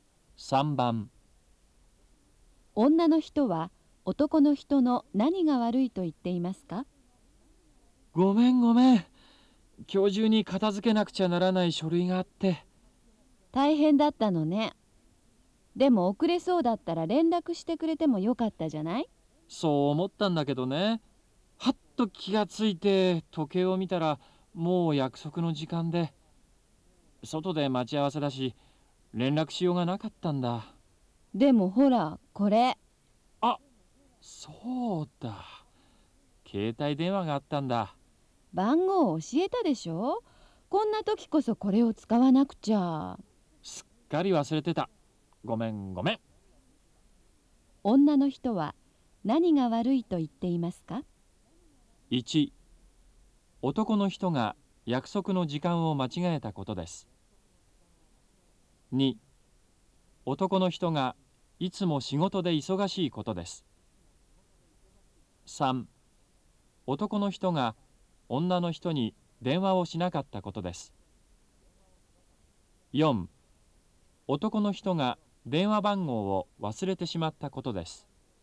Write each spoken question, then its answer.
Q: 女の人は男の人の何が悪いと言っていますか?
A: 3番、3